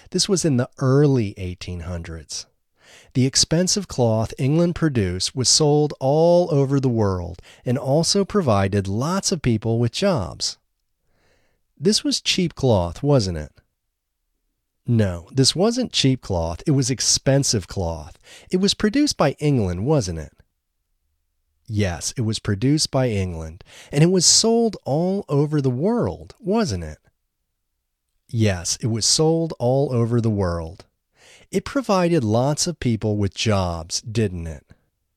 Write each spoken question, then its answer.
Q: This was cheap cloth, wasn't it?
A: No, this wasn't cheap cloth.

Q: It was produced by England, wasn't it?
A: Yes, it was produced by England.

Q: It provided lots of people with jobs, didn't it?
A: Yes, it provided lots of people with jobs.